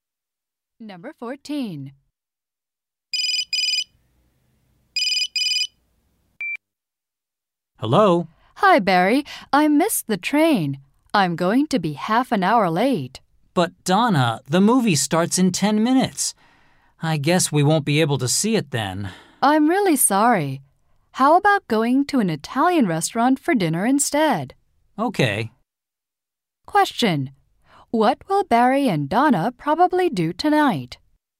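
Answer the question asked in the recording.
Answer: Eat dinner at an Italian restaurant.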